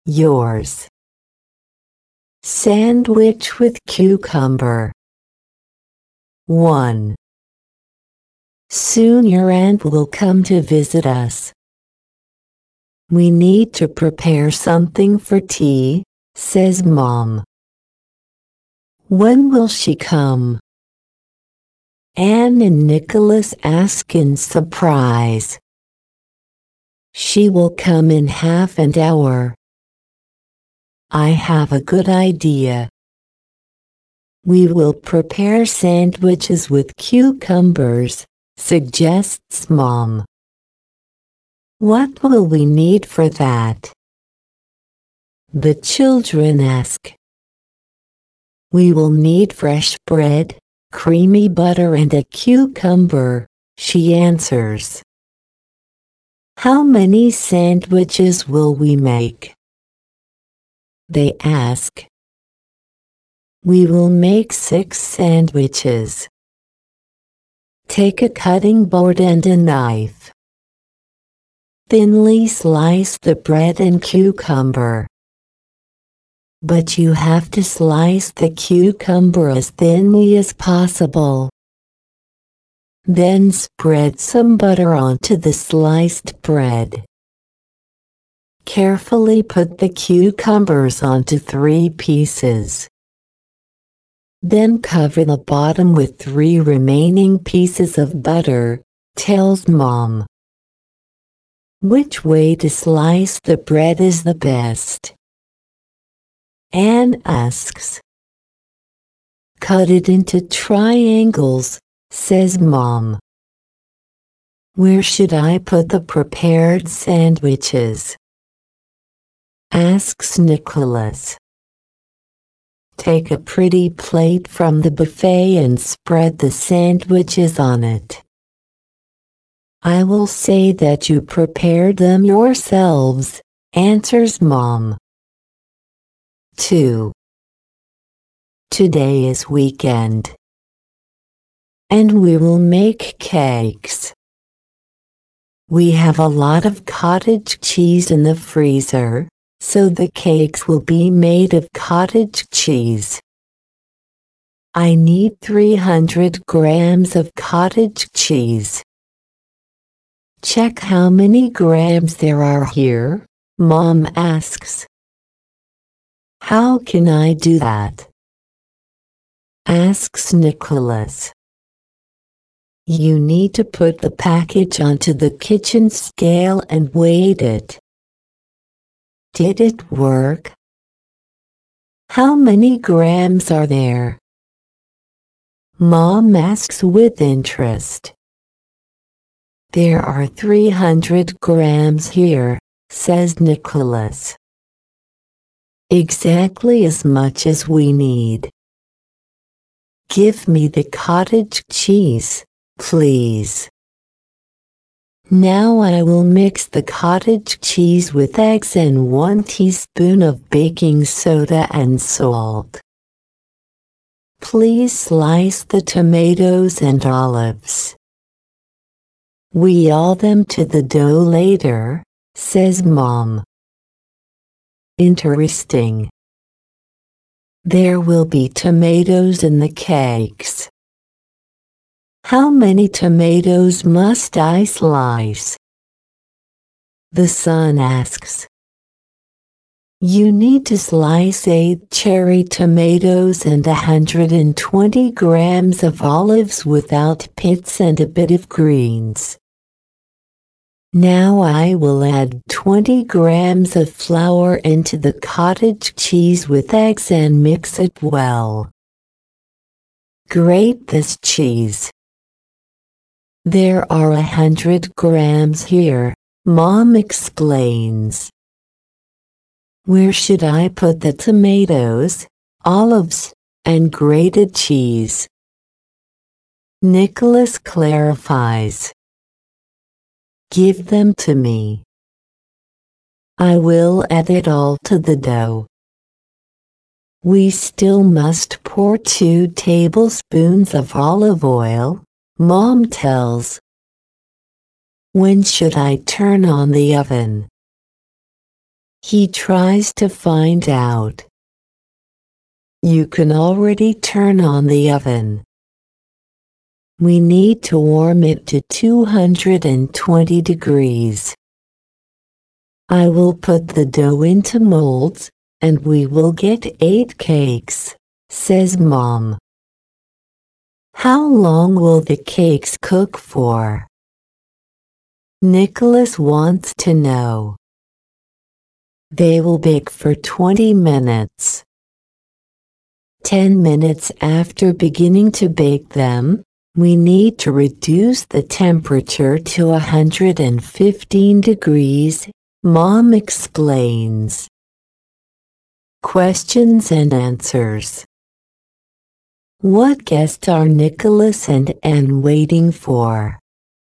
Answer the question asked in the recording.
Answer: They are waiting for their aunt.